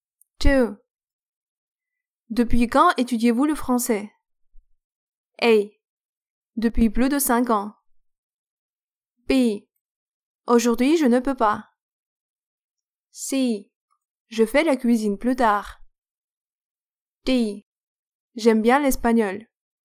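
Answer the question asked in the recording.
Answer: A: Depuis plus de 5 ans.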